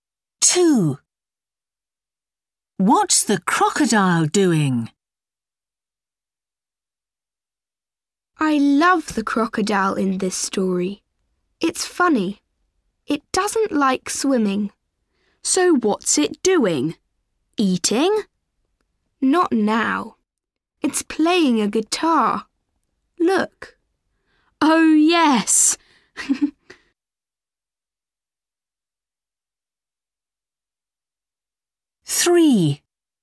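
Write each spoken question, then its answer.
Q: What's the crocodile doing?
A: Playing a guitar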